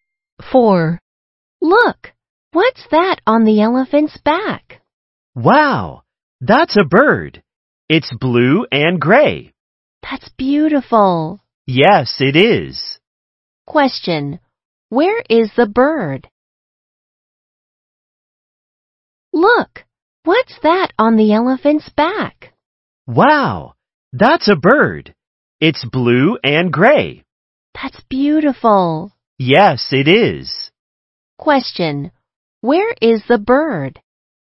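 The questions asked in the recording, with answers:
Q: where is the bird?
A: On the elephant's back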